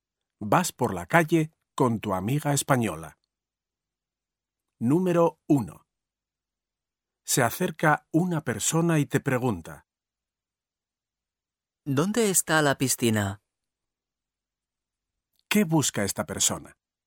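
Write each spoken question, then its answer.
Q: ¿Qué busca esta persona?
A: la piscina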